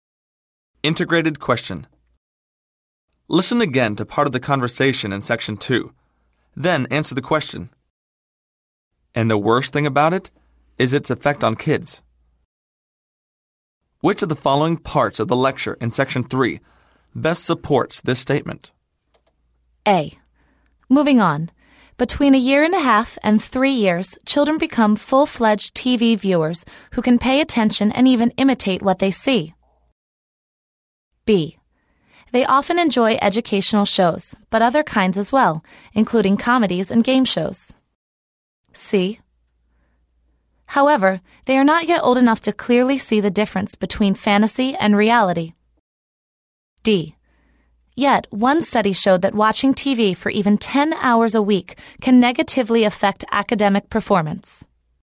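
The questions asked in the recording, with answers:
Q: Which of the following parts of the lecture in section 3 best supports this statement?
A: D: Yet, one study showed that watching TV for even 10 hours a week can negatively affect academic performance.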